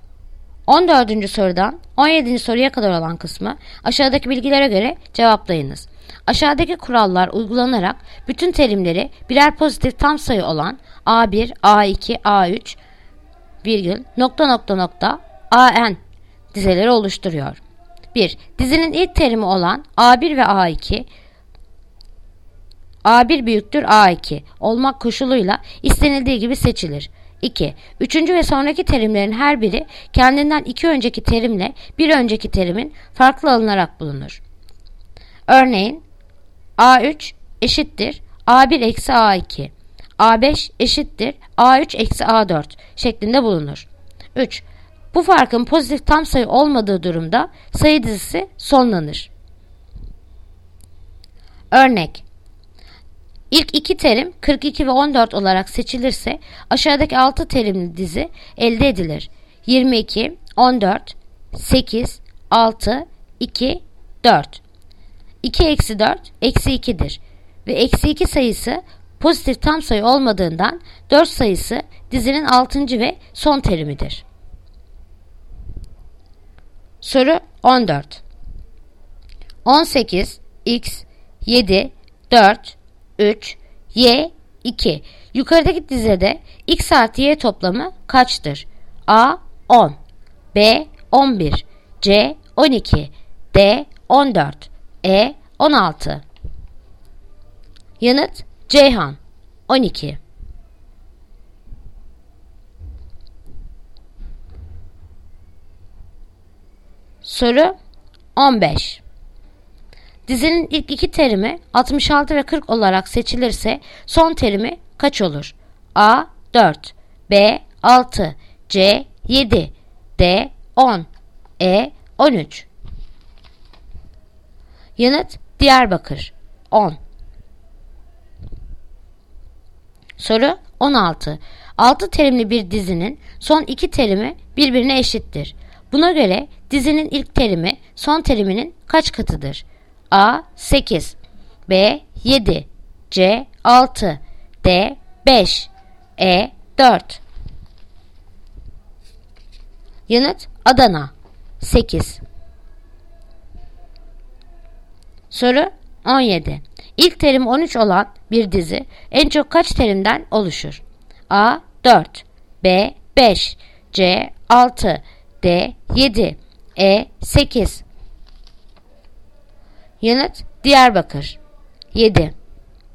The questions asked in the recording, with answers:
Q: Yukarıdaki dizede x artı y toplamı kaçtır?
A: Yanıt, Ceyhan, 12.

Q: Dizinin ilk iki terimi 66 ve 40 olarak seçilirse son terimi kaç olur?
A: Yanıt Diyarbakır 10.

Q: Buna göre dizinin ilk terimi son teriminin kaç katıdır?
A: Yanıt Adana 8